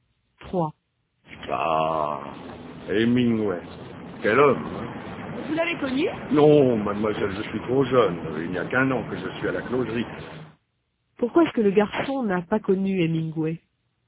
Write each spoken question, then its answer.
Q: Pourquoi est-ce que le garçon n'a pas connu Hemingway?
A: Parce qu'il est trop jeune.